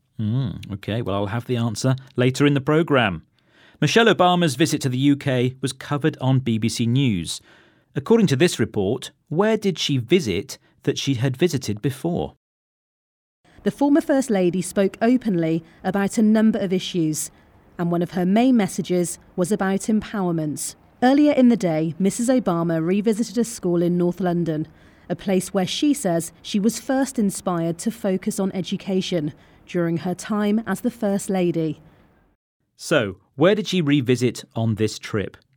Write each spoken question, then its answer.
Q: According to this report, where did she visit that she had visited before?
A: She went to a school in North London.